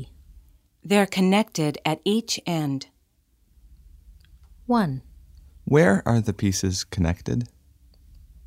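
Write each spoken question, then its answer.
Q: Where are the pieces connected?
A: At each end.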